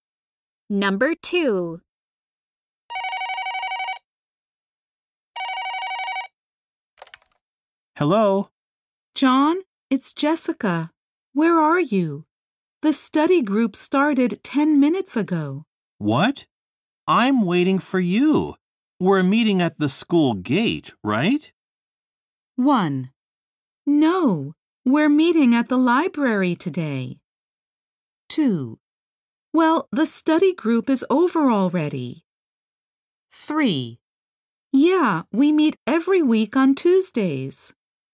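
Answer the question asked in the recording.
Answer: 1: No, we're meeting at the library today.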